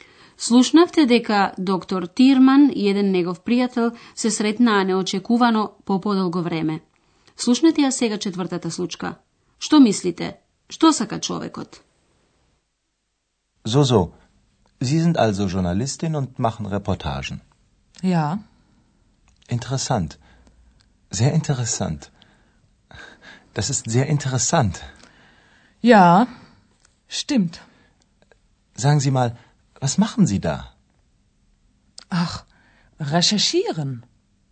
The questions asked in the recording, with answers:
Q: Што сака човекот?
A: Очигледно дека еден помлад човек сака да влезе во разговор, меѓутоа жената бара да биде оставена на мира.